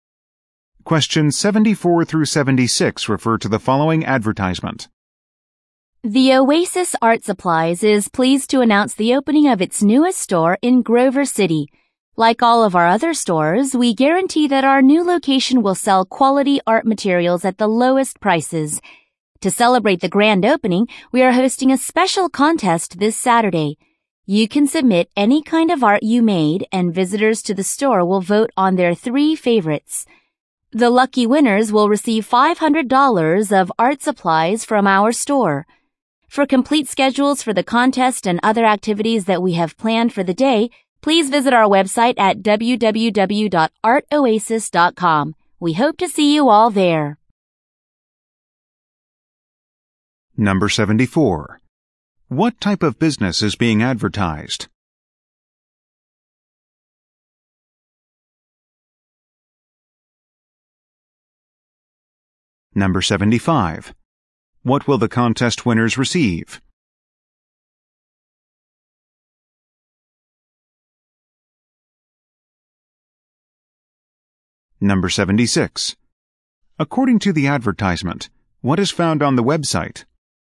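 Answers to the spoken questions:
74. An art supply store
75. $500 of art supplies
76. Schedules for the contest and activities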